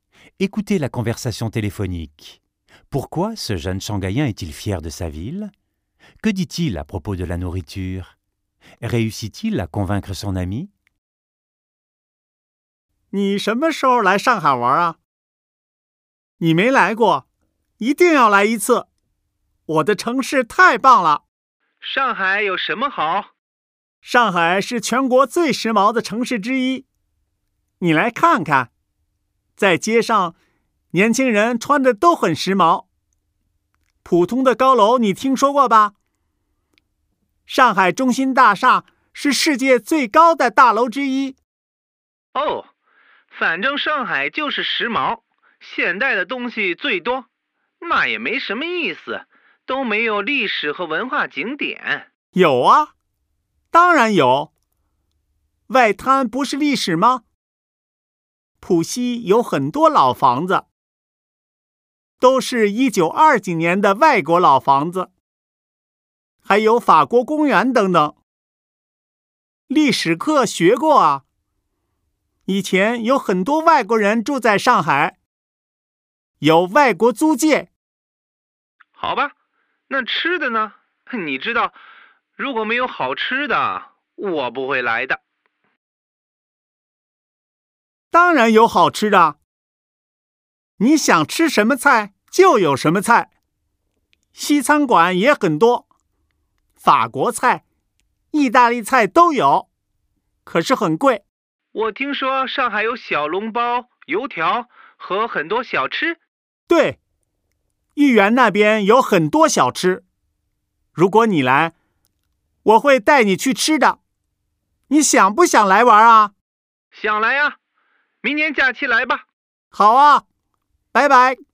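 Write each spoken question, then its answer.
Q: Pourquoi ce jeune Shanghaïen est-il fier de sa ville?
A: Shanghai est l'une des villes les plus à la mode et modernes de Chine, avec l'une des plus hautes tours du monde, et elle a aussi de l'histoire (le Bund, les vieilles maisons étrangères, le parc français)

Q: Que dit-il à propos de la nourriture?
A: On trouve toutes les cuisines, dont beaucoup de restaurants occidentaux (chers), et de nombreux petits plats comme les xiaolongbao et les youtiao, surtout près du jardin Yuyuan

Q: Réussit-il à convaincre son ami?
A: Oui, l'ami viendra pendant les vacances l'année prochaine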